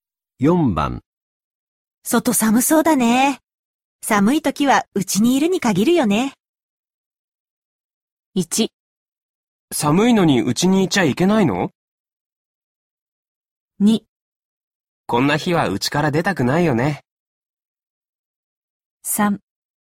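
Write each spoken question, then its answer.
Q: 外寒そうだね。寒い時はうちにいるに限るよね。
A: 2: こんな日は家から出たくないよね。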